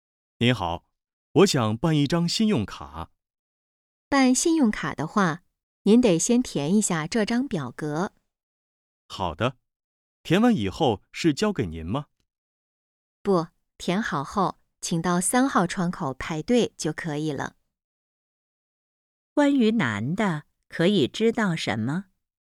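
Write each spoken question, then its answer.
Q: 关于男的,可以知道什么?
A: 他想办一张信用卡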